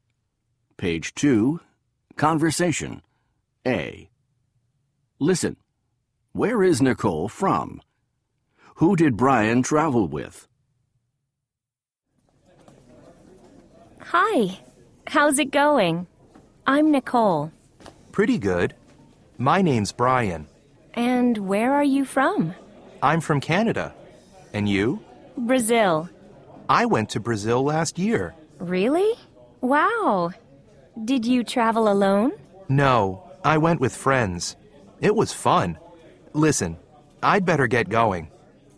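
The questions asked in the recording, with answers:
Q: Where is Nicole from?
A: Brazil

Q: Who did Brian travel with?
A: With friends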